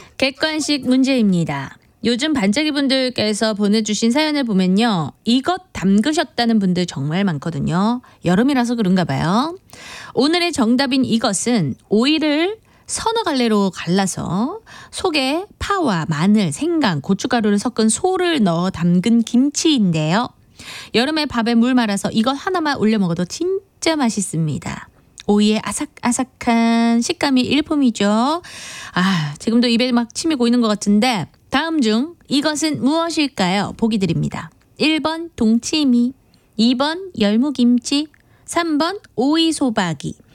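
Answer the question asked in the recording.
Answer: 3번: 오이소박이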